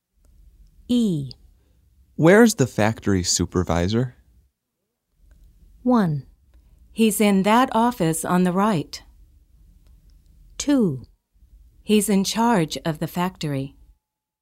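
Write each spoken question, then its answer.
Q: Where's the factory supervisor?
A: 1: He's in that office on the right.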